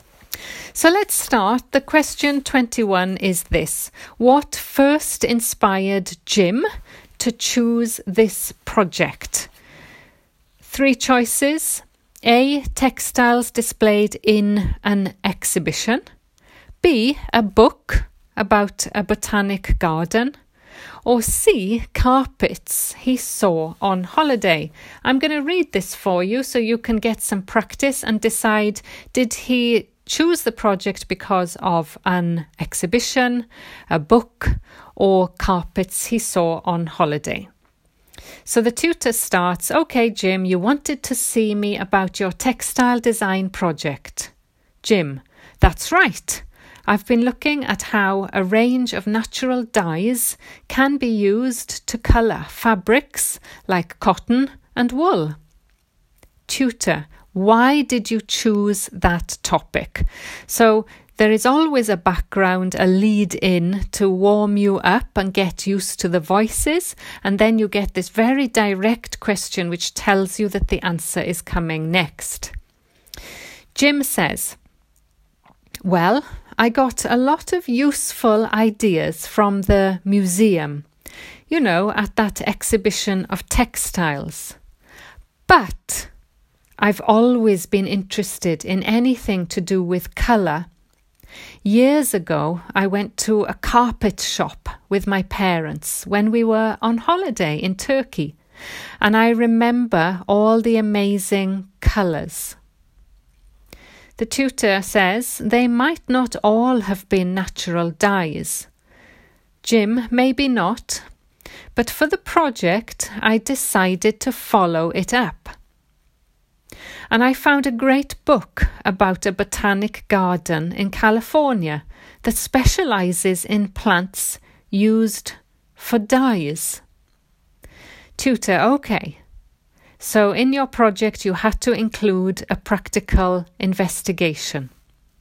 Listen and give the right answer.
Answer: But the actual inspiration came from the carpet shop.